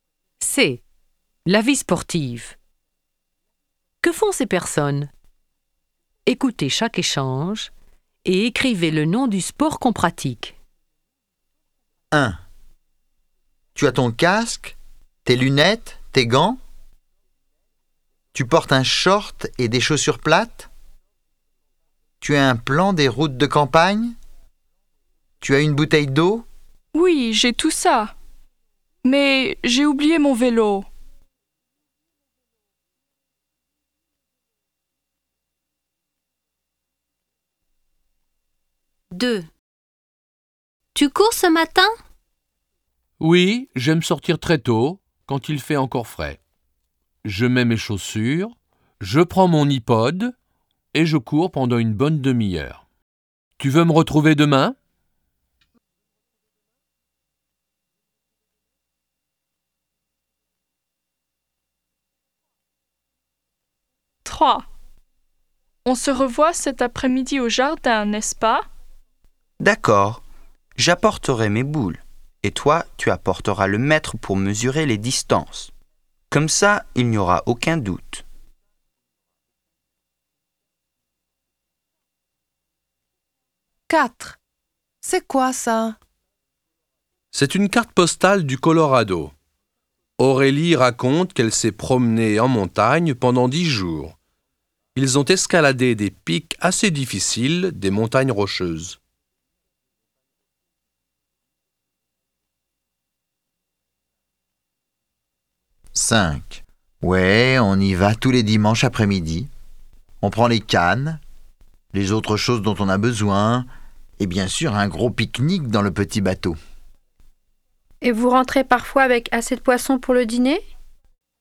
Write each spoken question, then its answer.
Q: Que font ces personnes? Écoutez chaque échange et écrivez le nom du sport qu'on pratique.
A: 1. Du cyclisme.

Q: Que font ces personnes? Écoutez chaque échange et écrivez le nom du sport qu'on pratique.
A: 2. Du jogging.

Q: Que font ces personnes? Écoutez chaque échange et écrivez le nom du sport qu'on pratique.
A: 3. À la pétanque.

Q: Que font ces personnes? Écoutez chaque échange et écrivez le nom du sport qu'on pratique.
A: 4. De l'alpinisme.

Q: Que font ces personnes? Écoutez chaque échange et écrivez le nom du sport qu'on pratique.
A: 5. À la pêche.